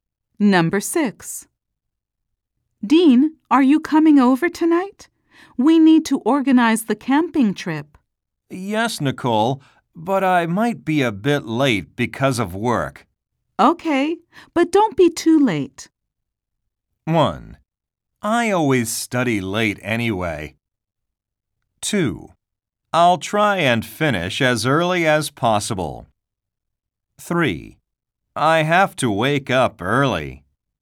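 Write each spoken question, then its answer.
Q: Okay, but don't be too late.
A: 2: I'll try and finish as early as possible.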